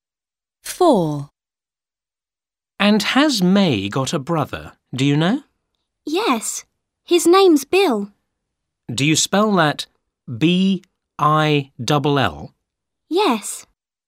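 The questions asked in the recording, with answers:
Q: And has May got a brother, do you know?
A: Yes, Bill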